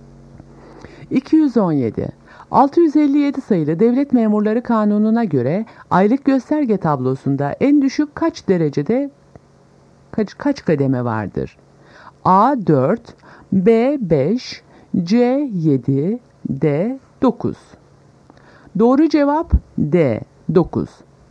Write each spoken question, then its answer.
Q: 657 sayılı Devlet Memurları Kanunu'na göre aylık gösterge tablosunda en düşük kaç derecede kaç kademe vardır?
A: Doğru cevap D 9.